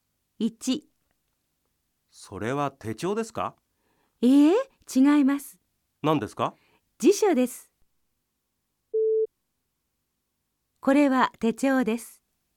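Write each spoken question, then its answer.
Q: これは手帳です。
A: ×(辞書です)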